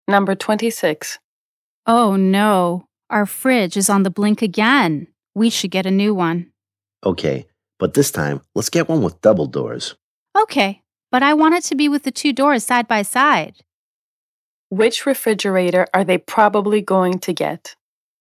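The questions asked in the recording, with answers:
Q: Which refrigerator are they probably going to get?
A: One with two doors side by side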